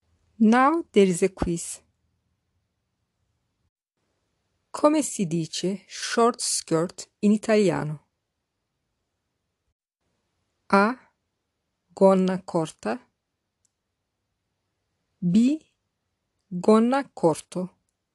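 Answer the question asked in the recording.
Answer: A: Gonna corta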